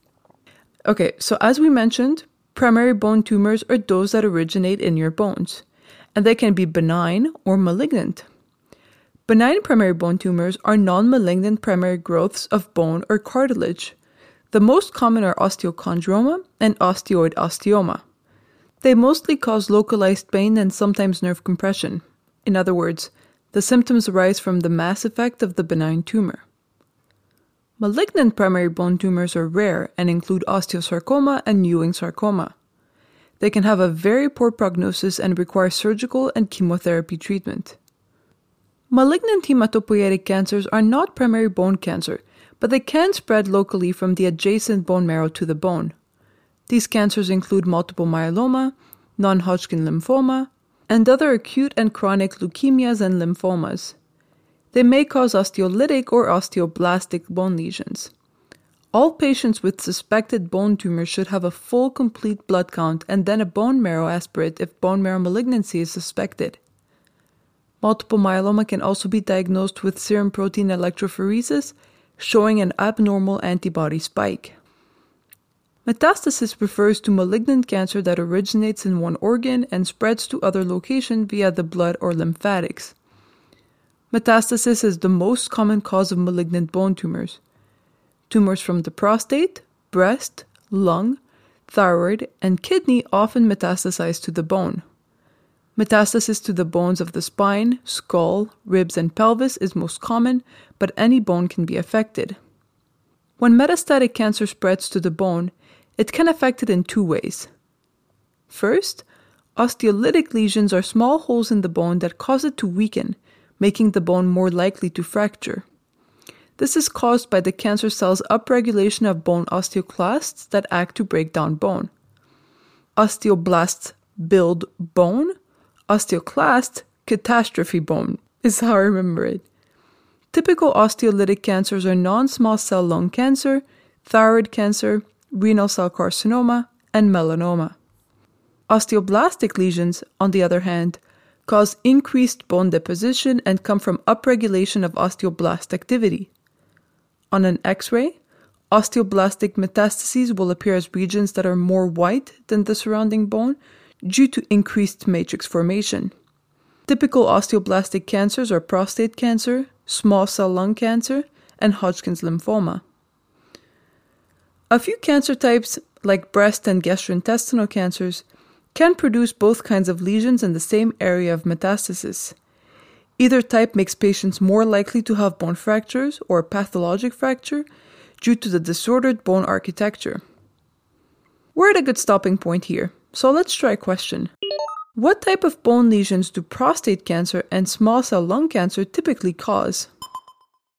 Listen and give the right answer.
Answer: These cancers typically cause osteoblastic lesions.